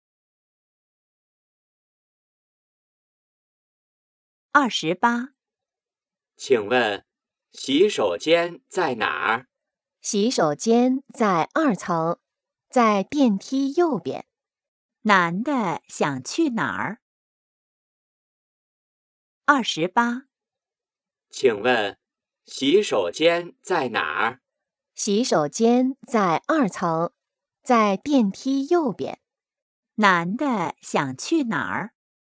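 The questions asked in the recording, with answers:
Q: 男的想去哪儿?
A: 洗手间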